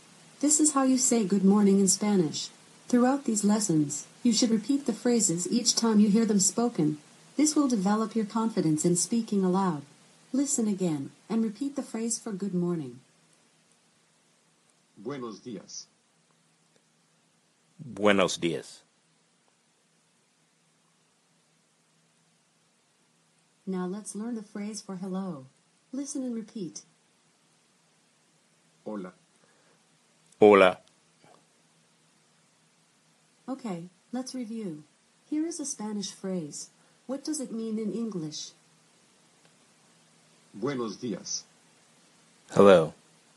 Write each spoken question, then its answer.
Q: What does it mean in English?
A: The correct answer is, good morning.